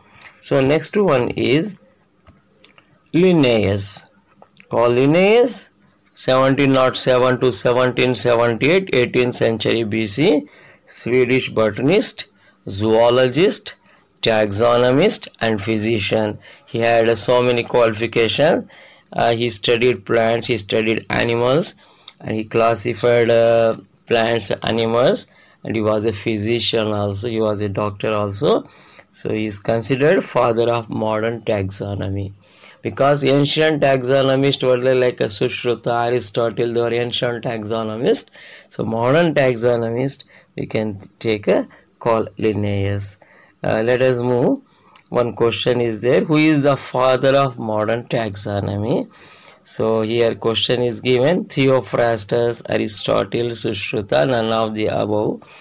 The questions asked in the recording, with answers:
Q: Who is the father of modern taxonomy?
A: So, our answer should be D, that is none of the above.